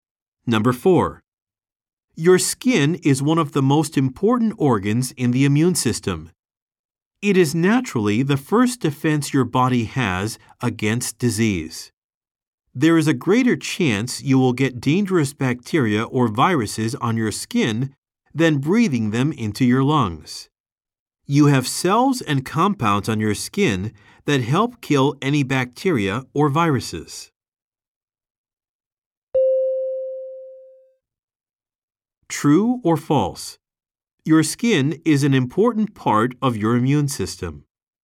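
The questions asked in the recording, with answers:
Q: True or false? Your skin is an important part of your immune system.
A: True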